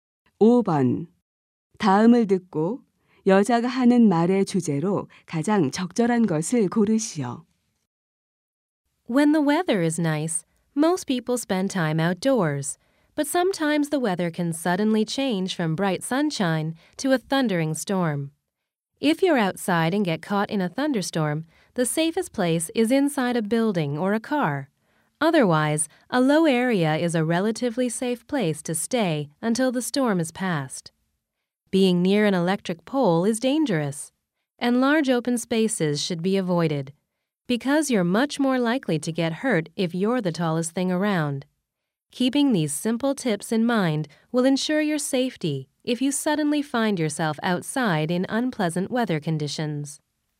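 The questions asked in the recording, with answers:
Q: 다음을 듣고 여자가 하는 말의 주제로 가장 적절한 것을 고르시오.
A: 야외에서 뇌우를 만났을 때의 안전 수칙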